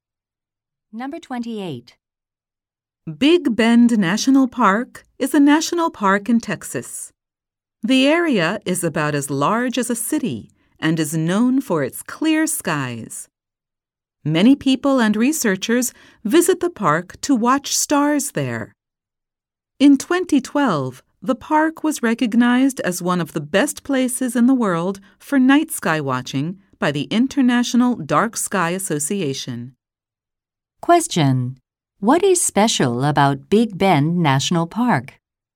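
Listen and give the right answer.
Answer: It is one of the best places in the world for night sky watching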